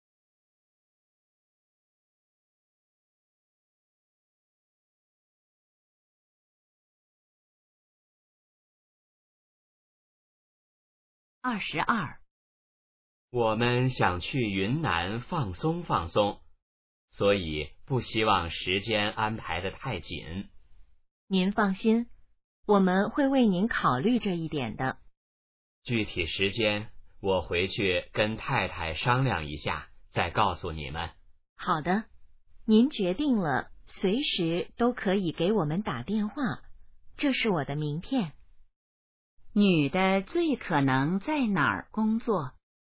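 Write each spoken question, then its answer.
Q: 女的最可能在哪儿工作?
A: 旅行社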